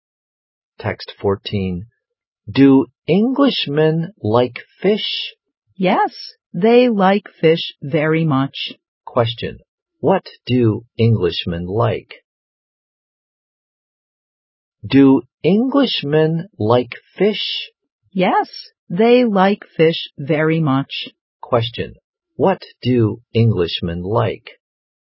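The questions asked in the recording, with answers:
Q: What do Englishmen like?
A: Fish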